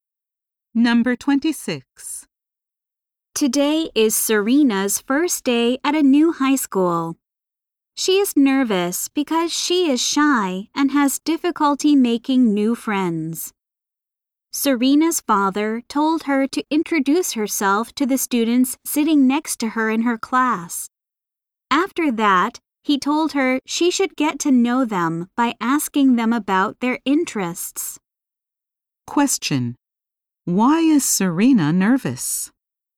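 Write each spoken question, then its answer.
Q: Why is Serena nervous?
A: She is shy and has difficulty making new friends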